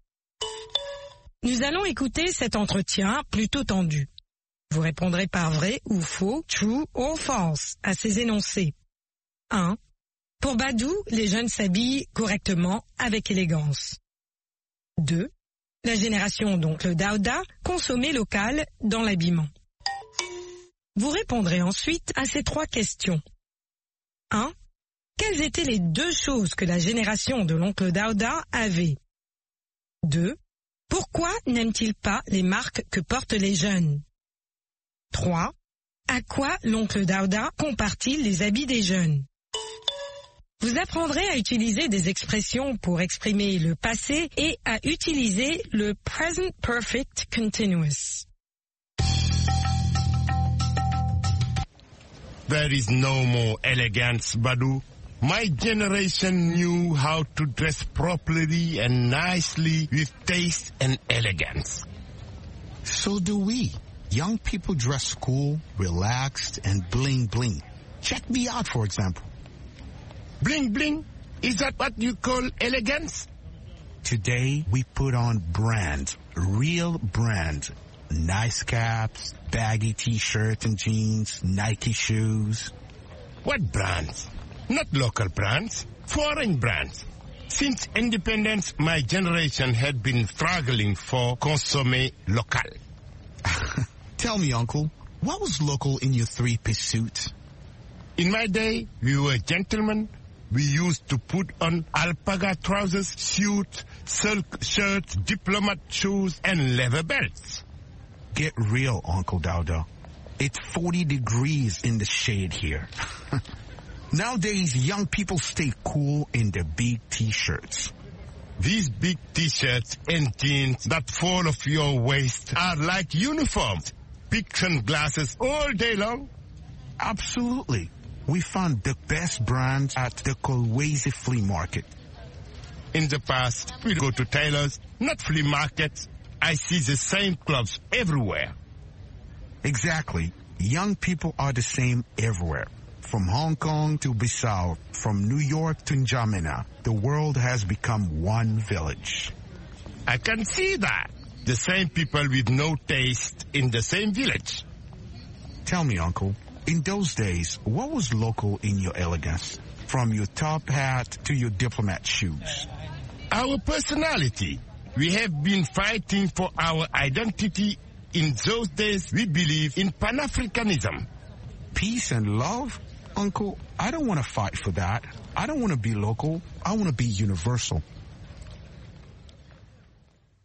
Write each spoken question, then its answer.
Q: Pour Badou, les jeunes s'habillent correctement, avec élégance.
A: L'énoncé 1 est vrai.

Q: La génération, donc le Daouda, consommait local dans l'habillement.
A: L'énoncé 2 est faux.

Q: Quelles étaient les deux choses que la génération de l'oncle Daouda avait?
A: Le goût et l'élégance.

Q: Pourquoi n'aime-t-il pas les marques que portent les jeunes?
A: Parce qu'elles sont étrangères.

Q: À quoi l'oncle Daouda compare-t-il les habits des jeunes?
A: À des uniformes.